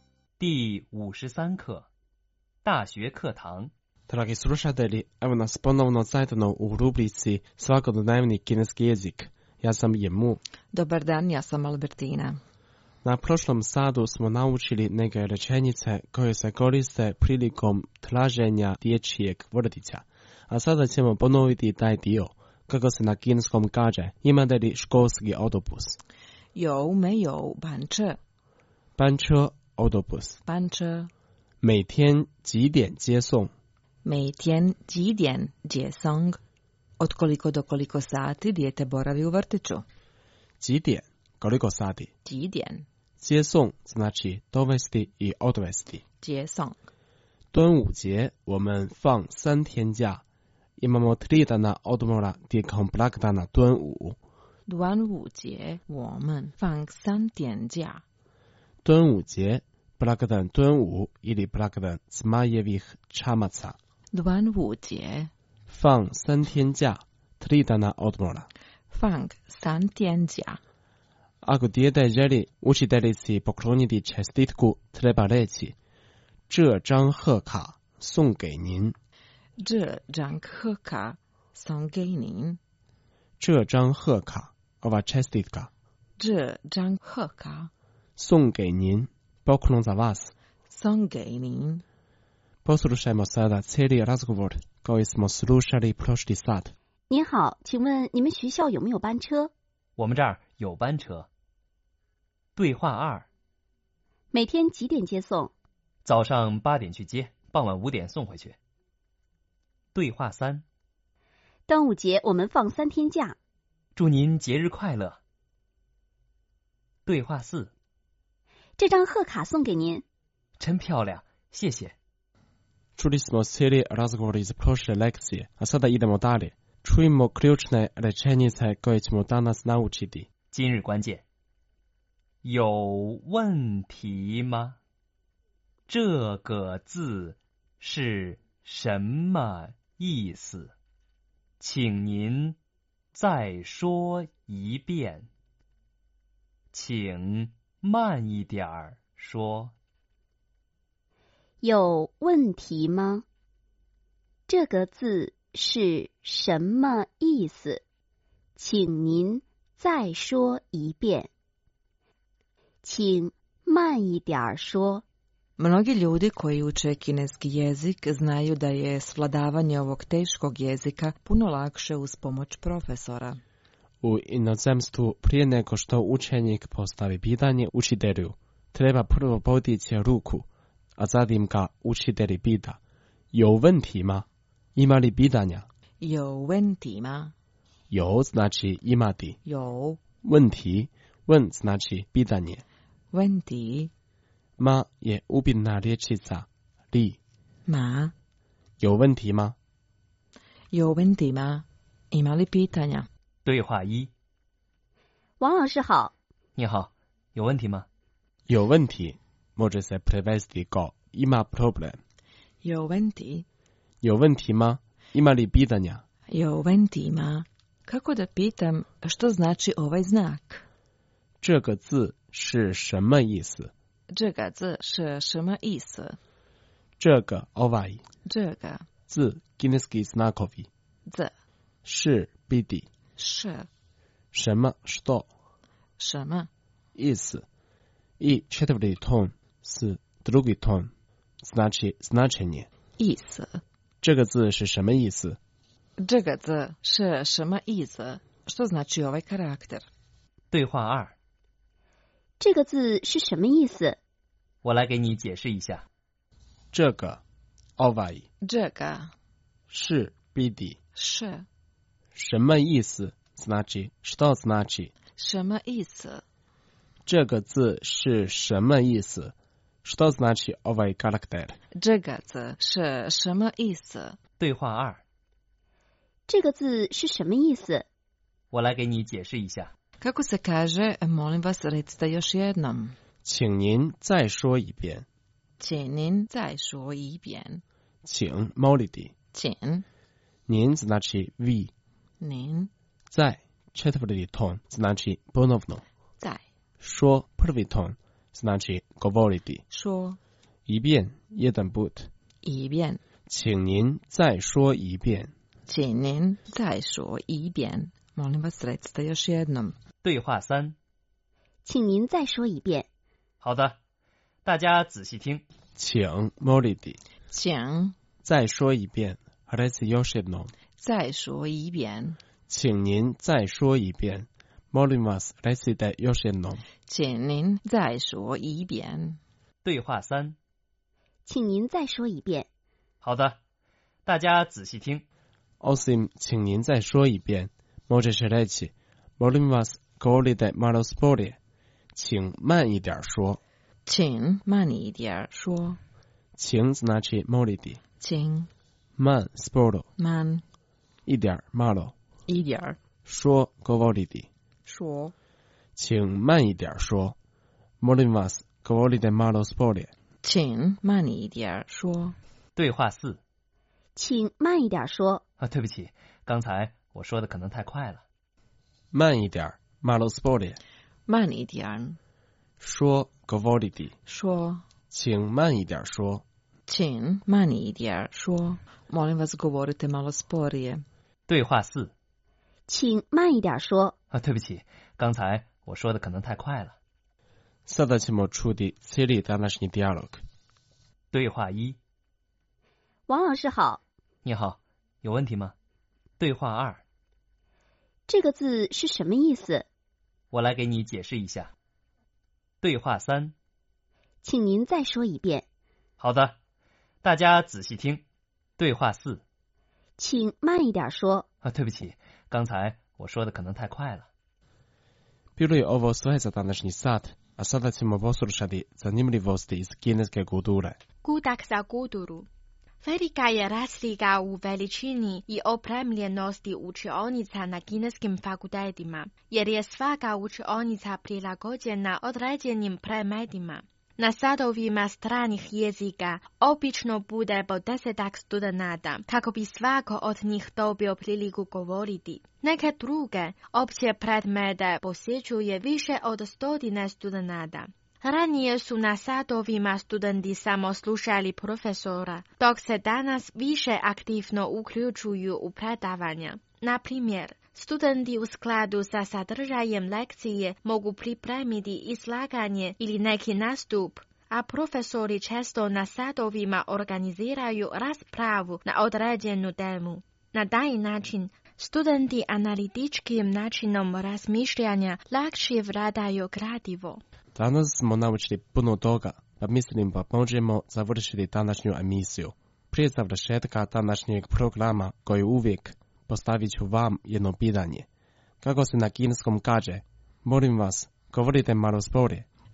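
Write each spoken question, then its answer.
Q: Kako se na kineskom kaže, molim vas, govorite malo sporije.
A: 请慢一点说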